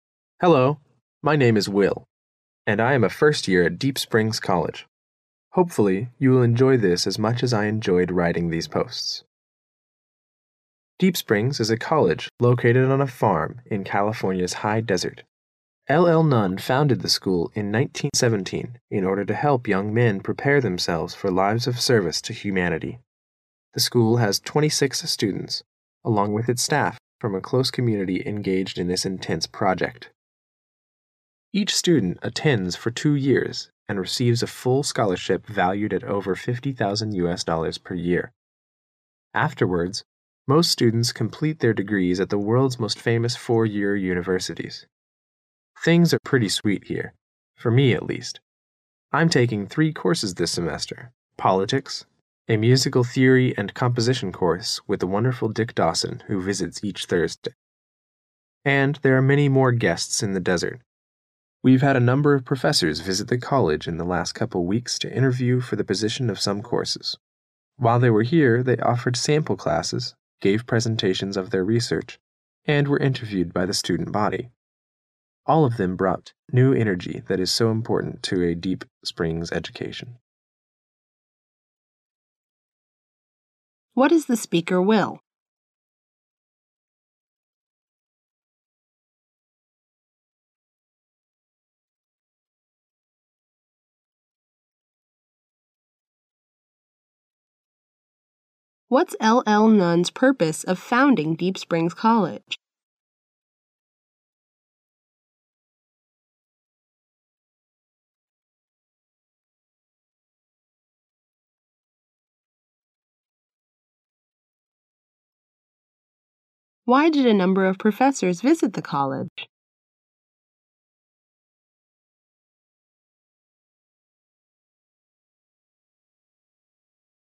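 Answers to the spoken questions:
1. A first-year student at Deep Springs College
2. To help young men prepare themselves for lives of service to humanity
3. To interview for the position of some courses

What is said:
My name is Will, and I am a first year at Deep Springs College. Hopefully you will enjoy this as much as I enjoyed writing these posts. Deep Springs is a college located on a farm in California's High Desert. L.L. Nunn founded the school in 1917 in order to help young men prepare themselves for lives of service to humanity. The school has 26 students, along with its staff, from a close community engaged in this intense project. Each student attends for two years and receives a full scholarship valued at over $50, 000 per year. Afterwards, most students complete their degrees at the world's most famous four-year universities. Things are pretty sweet here. For me, at least. 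I'm taking three courses this semester: politics, a musical theory and composition course with the wonderful Dick Dawson, who visits each Thursday. And there are many more guests in the desert—we've had a number of professors visit the college in the last couple weeks to interview for the position of some courses. While they were here, they offered sample classes, gave presentations of their research, and were interviewed by the Student Body. All of them brought new energy that is so important to a Deep Springs education.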